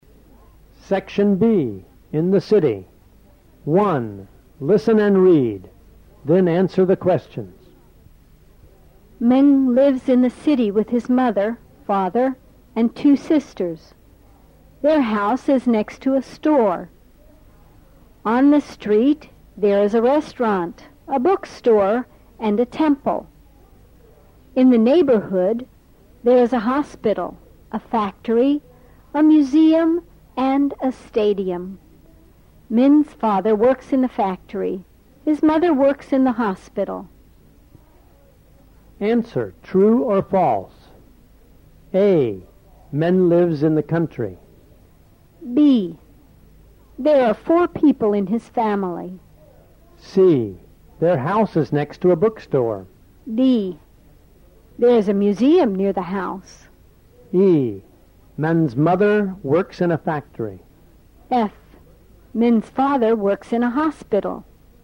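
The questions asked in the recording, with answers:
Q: Min lives in the country.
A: False

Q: There are four people in his family.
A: False

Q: Their house is next to a bookstore.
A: False

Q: There is a museum near the house.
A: True

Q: Min's mother works in a factory.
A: False

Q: Min's father works in a hospital.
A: False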